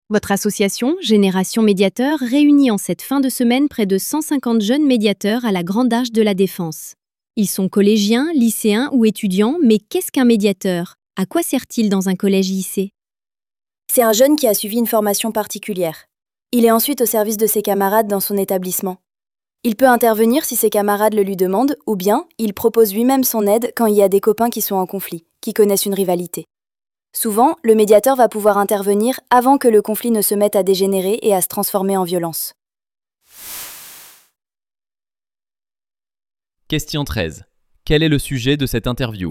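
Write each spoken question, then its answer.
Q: Quel est le sujet de cette interview ?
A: Le rôle des jeunes médiateurs qui aident à régler les conflits entre élèves dans les collèges et lycées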